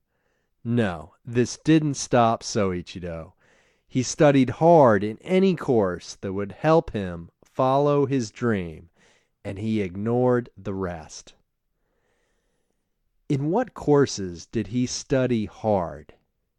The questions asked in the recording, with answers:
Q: In what courses did he study hard?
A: He studied hard in any course that would help him follow his dream.